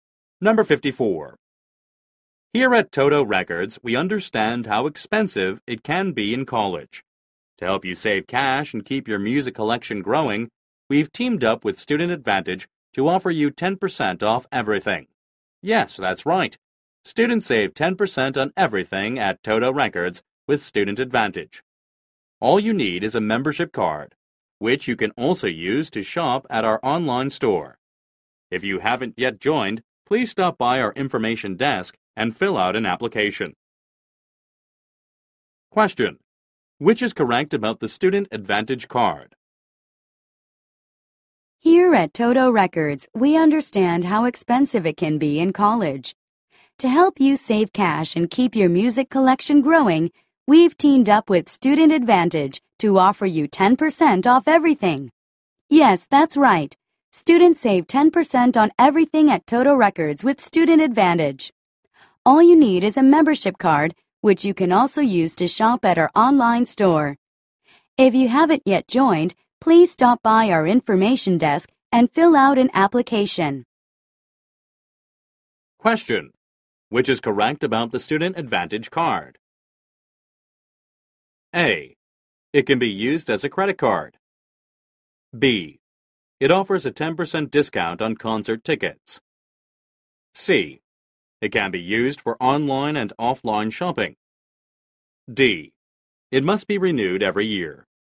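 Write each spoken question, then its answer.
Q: Which is correct about the Student Advantage card?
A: C: It can be used for online and offline shopping.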